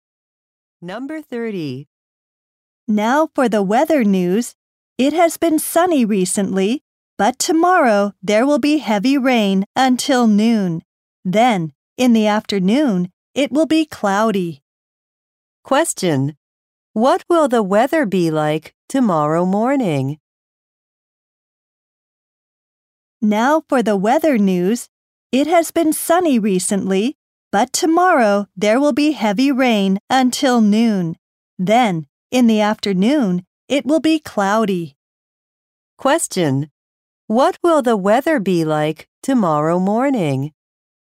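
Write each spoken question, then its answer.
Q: What will the weather be like tomorrow morning?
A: Heavy rain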